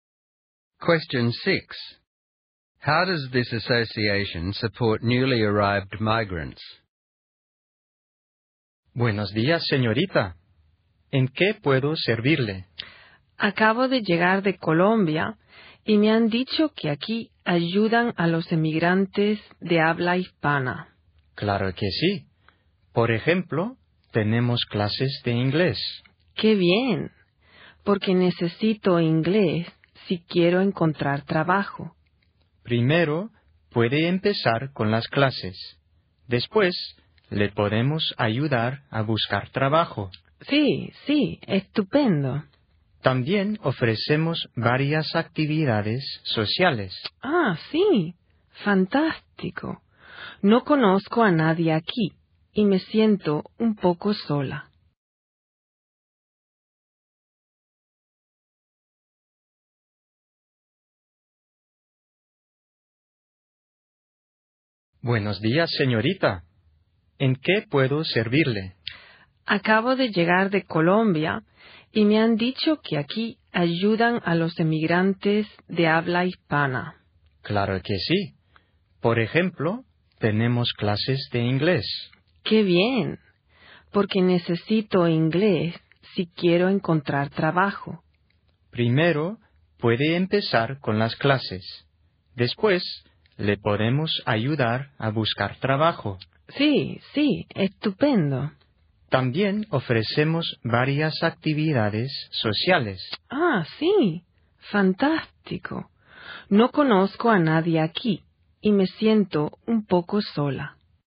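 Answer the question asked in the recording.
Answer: It offers English classes, help finding work and social activities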